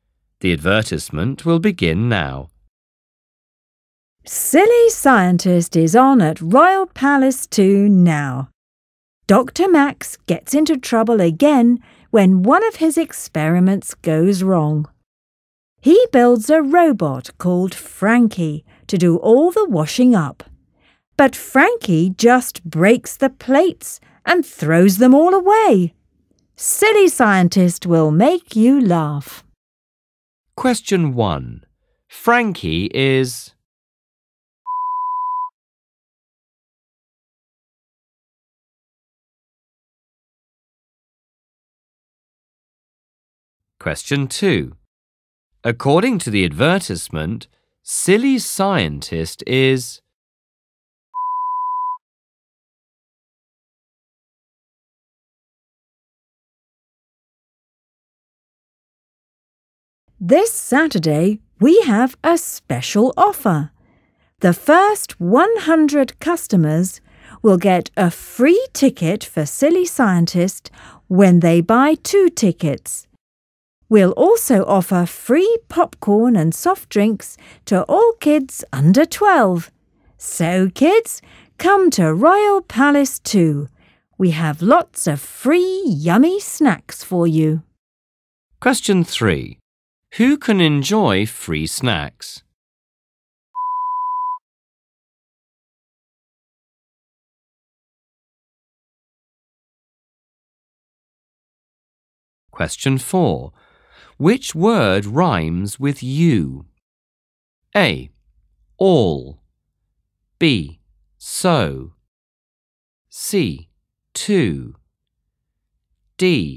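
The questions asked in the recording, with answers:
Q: Who can enjoy free snacks?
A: Kids under 12

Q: Which word rhymes with you?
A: C: Too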